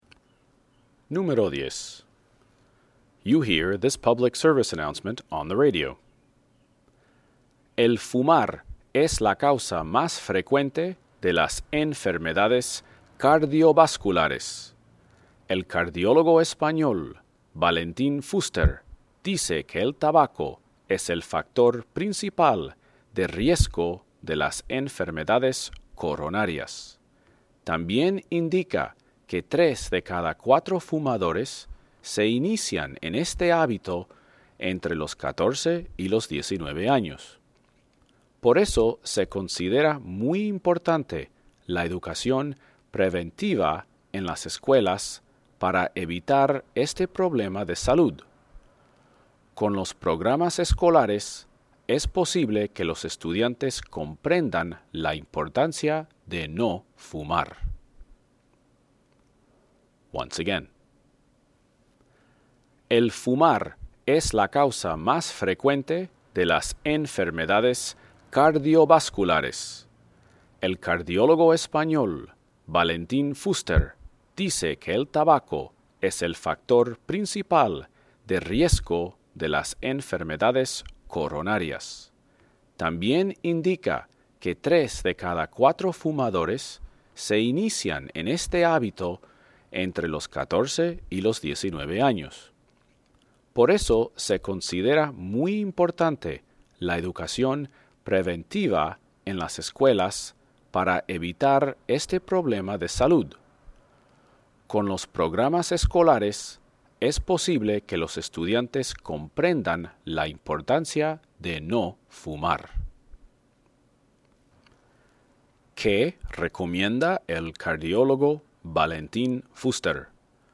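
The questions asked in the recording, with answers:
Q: ¿Qué recomienda el cardiólogo Valentín Fuster?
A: La educación preventiva en las escuelas para evitar que los jóvenes empiecen a fumar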